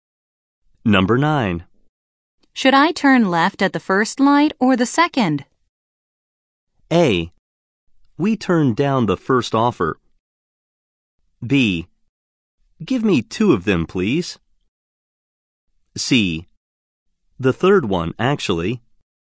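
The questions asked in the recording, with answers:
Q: Should I turn left at the first light or the second?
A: C: The third one, actually.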